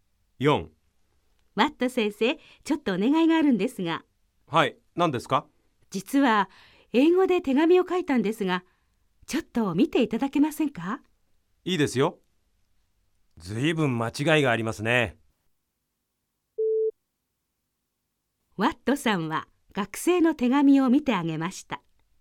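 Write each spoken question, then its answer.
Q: ワットさんは学生の手紙を見てあげました。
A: ○(正しい)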